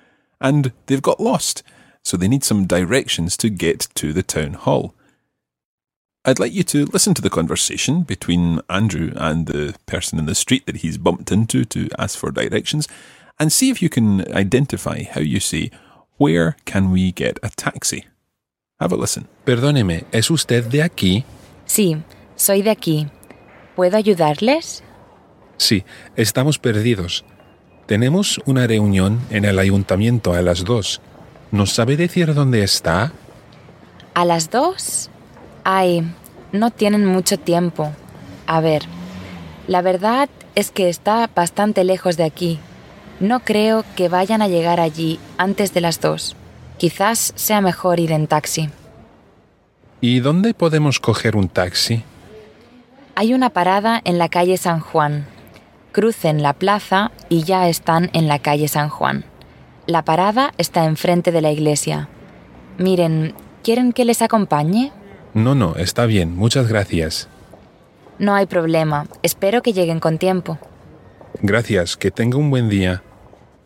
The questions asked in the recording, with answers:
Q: I'd like you to listen to the conversation between Andrew and the person in the street that he's bumped into to ask for directions, and see if you can identify how you say, where can we get a taxi?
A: Yes, he said, ¿dónde podemos coger un taxi?